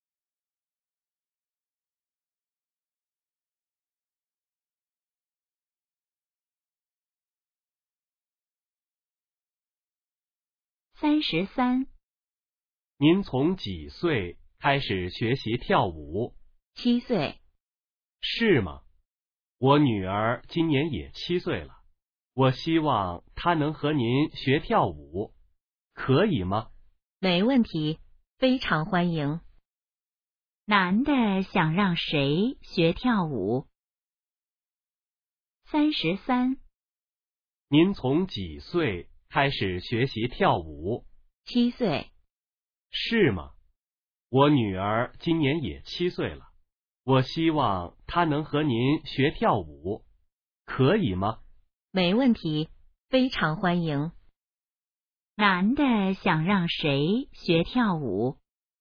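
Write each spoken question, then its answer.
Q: 男的想让谁学跳舞?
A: 他的女儿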